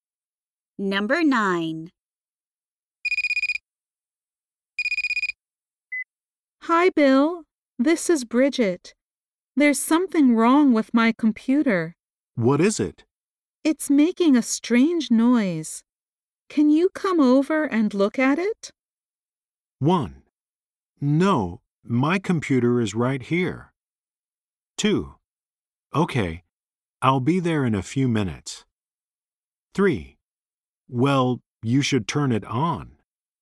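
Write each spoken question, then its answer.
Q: Can you come over and look at it?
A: 2: Okay, I'll be there in a few minutes.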